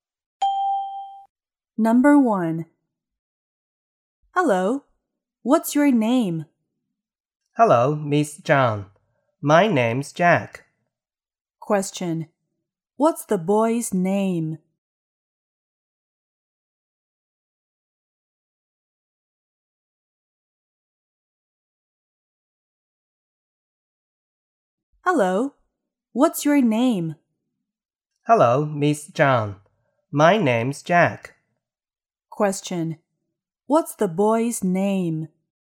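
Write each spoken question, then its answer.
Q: What's the boy's name?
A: Jack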